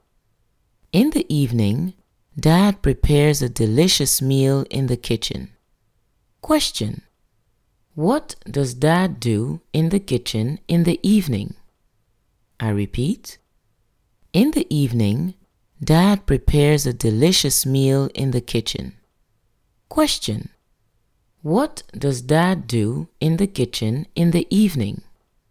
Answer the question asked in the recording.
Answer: In the evening, Dad prepares a delicious meal in the kitchen.